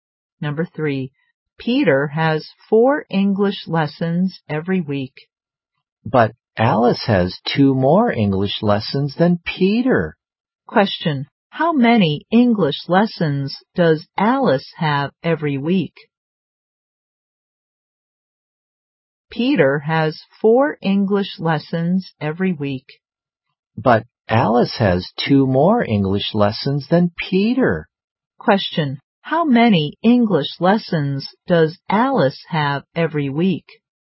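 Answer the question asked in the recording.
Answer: Six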